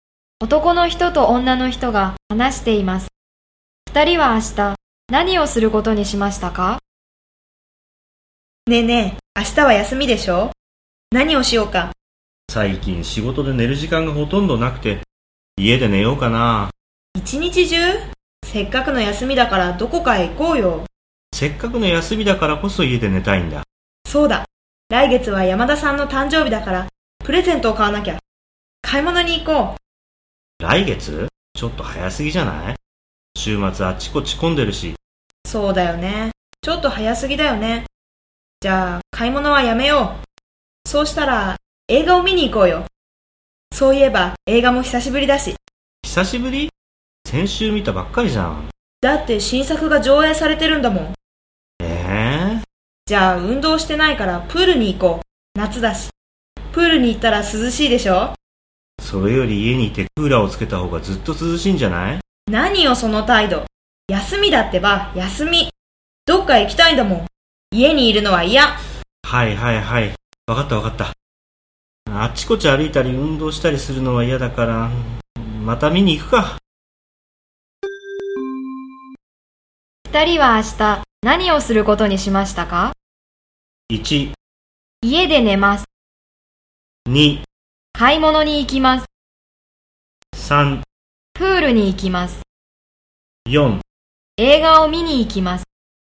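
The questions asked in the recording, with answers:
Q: 二人は明日何をすることにしましたか?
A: 4: 映画を見に行きます。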